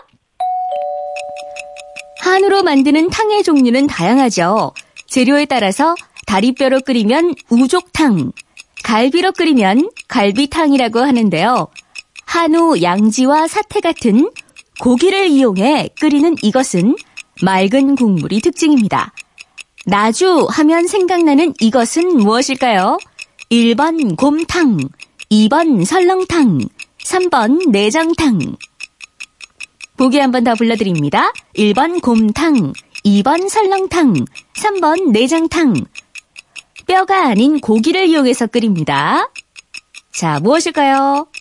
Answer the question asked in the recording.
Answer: 정답은 1번 아, 곰탕이었습니다.